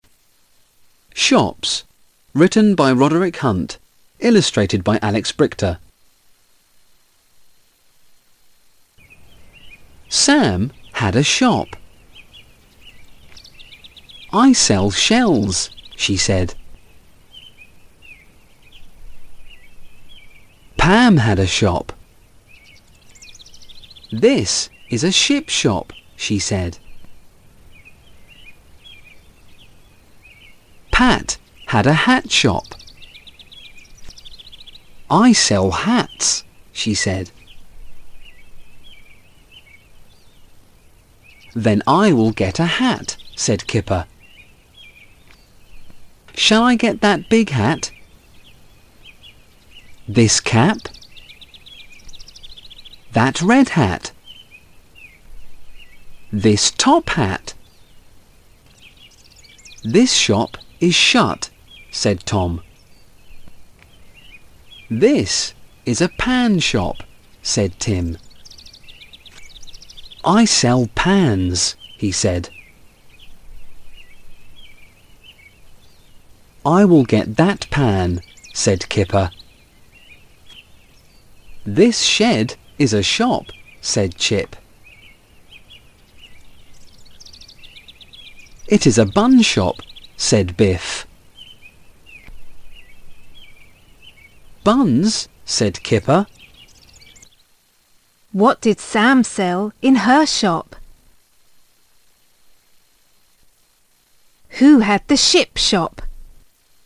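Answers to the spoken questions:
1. Shells
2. Pam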